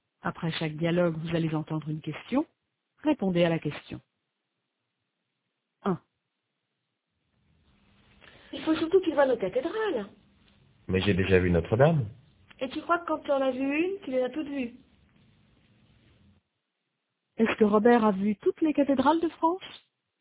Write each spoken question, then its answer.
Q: Est-ce que Robert a vu toutes les cathédrales de France?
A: Non, mais il a déjà vu Notre-Dame.